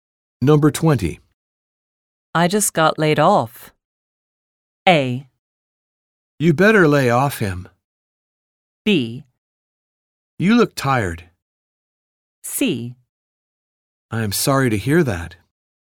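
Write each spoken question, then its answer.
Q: I just got laid off.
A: C: I am sorry to hear that.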